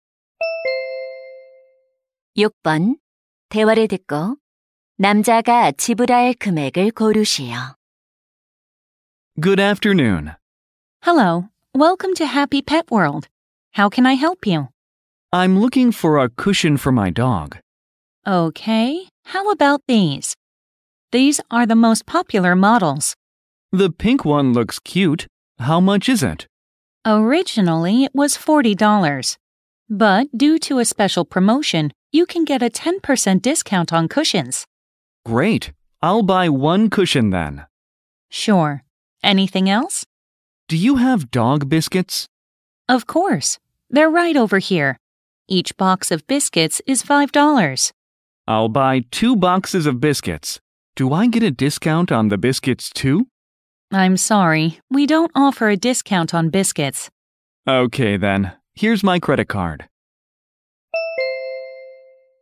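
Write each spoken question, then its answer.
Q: 대화를 듣고 남자가 지불할 금액을 고르시오.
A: 46달러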